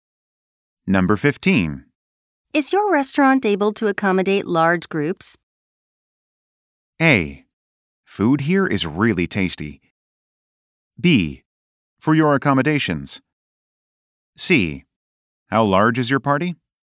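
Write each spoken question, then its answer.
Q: Is your restaurant able to accommodate large groups?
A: C: How large is your party?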